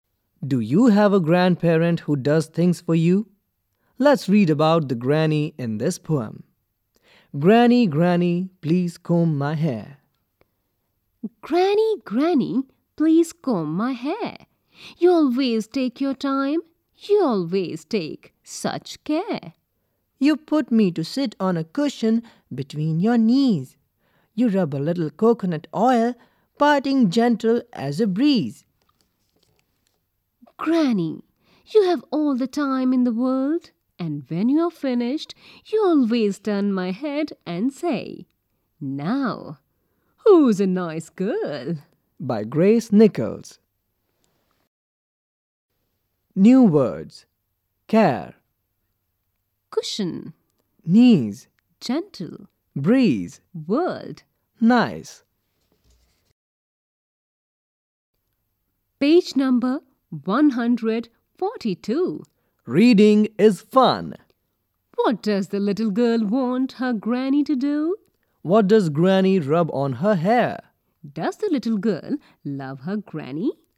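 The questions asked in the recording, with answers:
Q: What does the little girl want her granny to do?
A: Comb her hair

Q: What does granny rub on her hair?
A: A little coconut oil

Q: Does the little girl love her granny?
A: Yes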